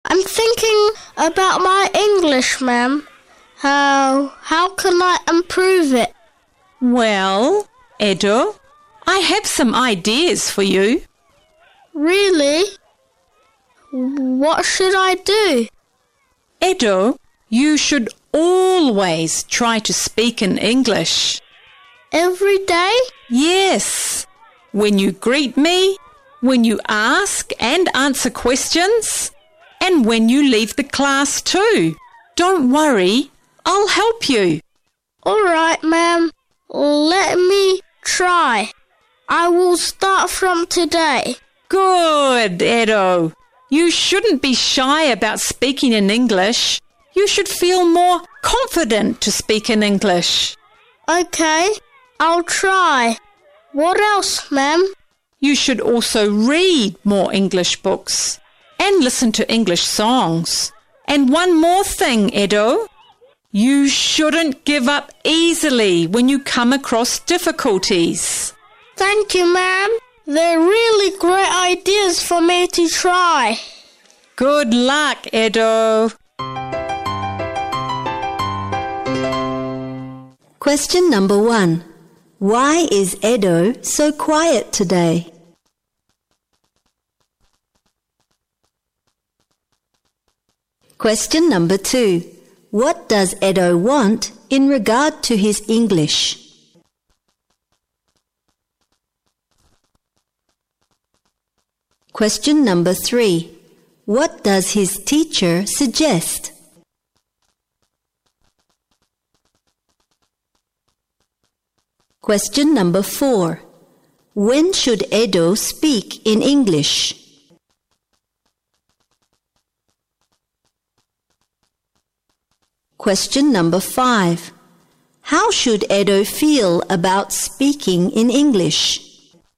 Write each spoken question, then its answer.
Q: Why is Edo so quiet today?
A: Because he is thinking about his English.

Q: What does Edo want in regard to his English?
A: He wants to improve it.

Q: What does his teacher suggest?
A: To try to speak in English, to read more English books, to listen to English songs, and not to give up easily when coming across difficulties.

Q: When should Edo speak in English?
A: Every day.